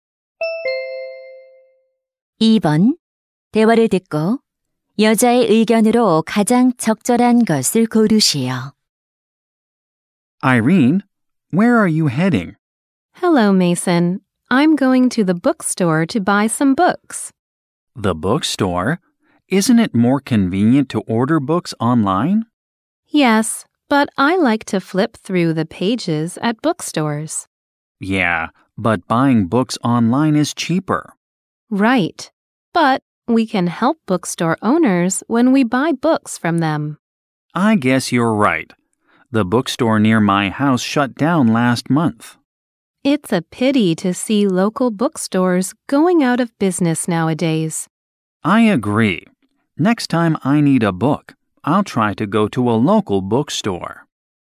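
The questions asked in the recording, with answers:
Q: 대화를 듣고 여자의 의견으로 가장 적절한 것을 고르시오.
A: 지역 서점에서 책을 사는 것이 서점 주인들을 돕는다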